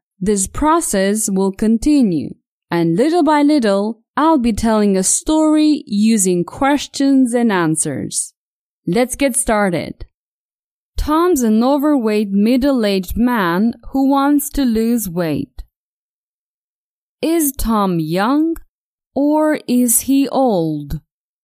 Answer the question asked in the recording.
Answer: Tom isn't young, but he isn't old either.